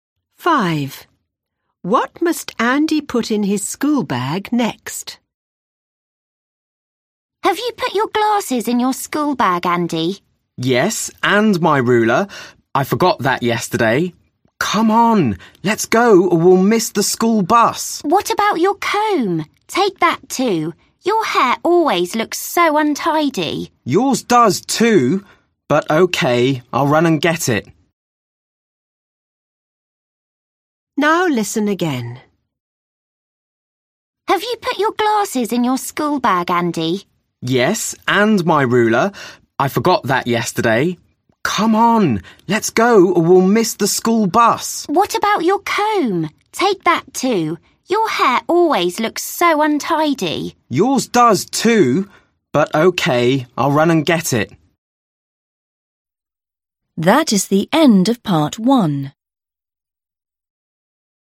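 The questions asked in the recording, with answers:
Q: What must Andy put in his school bag next?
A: His comb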